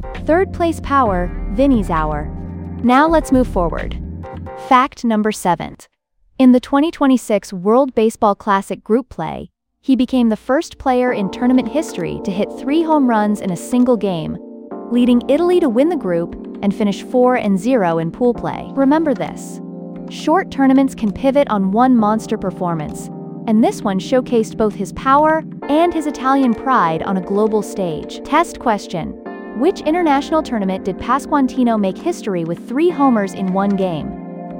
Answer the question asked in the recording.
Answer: World Baseball Classic.